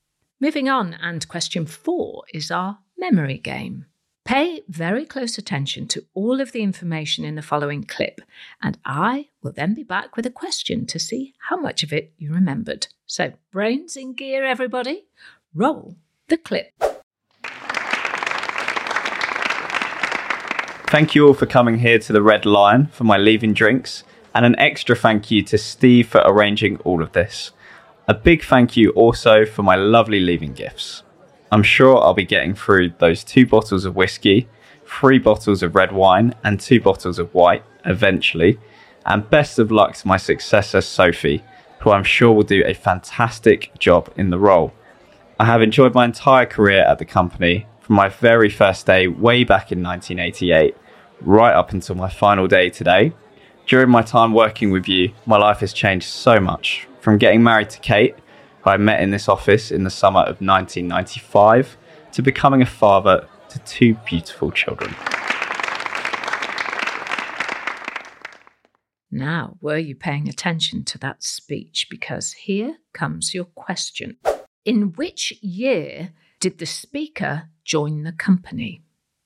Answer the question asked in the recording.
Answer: 1988.